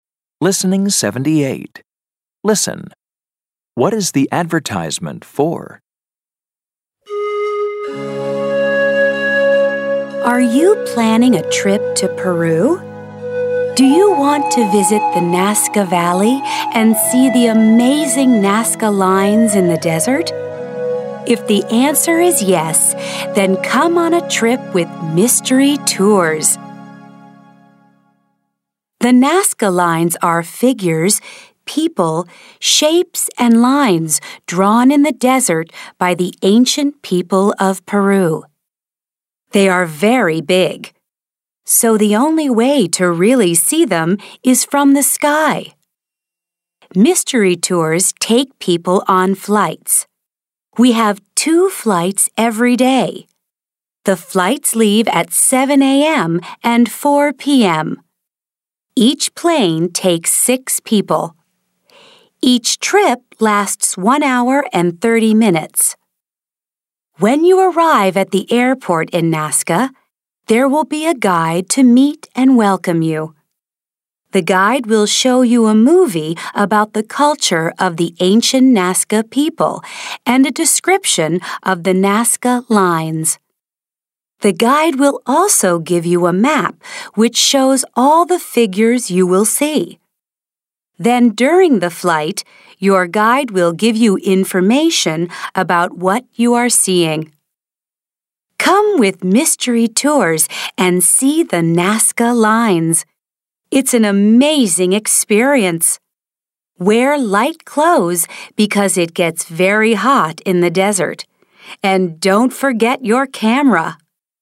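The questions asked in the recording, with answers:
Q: What is the advertisement for?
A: Flights over the Nazca lines in Peru with Mystery Tours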